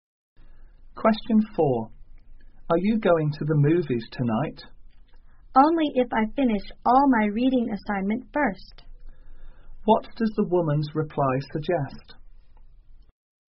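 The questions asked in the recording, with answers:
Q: What does the woman's reply suggest?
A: She will go to the movies only if she finishes her reading assignment first.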